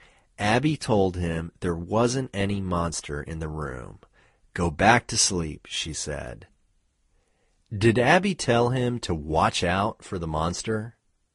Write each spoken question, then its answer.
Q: Did Abby tell him to watch out for the monster?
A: No, Abby didn't tell him to watch out for the monster.